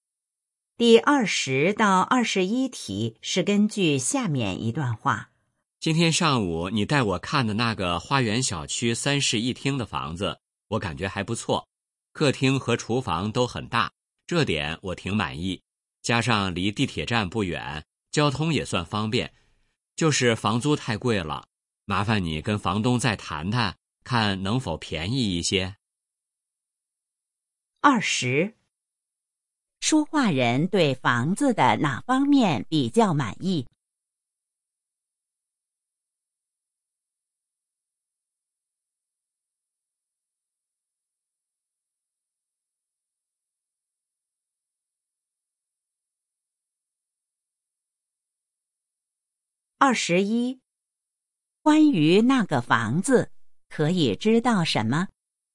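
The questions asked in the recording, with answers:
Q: 说话人对房子的哪方面比较满意?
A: 客厅和厨房都很大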